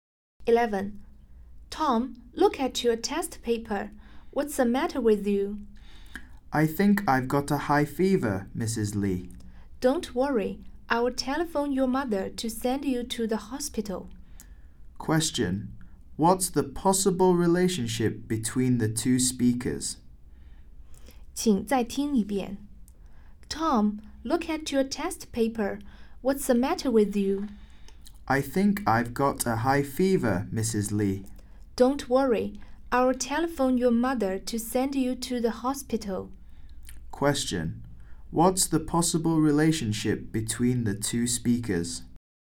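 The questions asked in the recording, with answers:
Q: What's the possible relationship between the two speakers?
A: Teacher and student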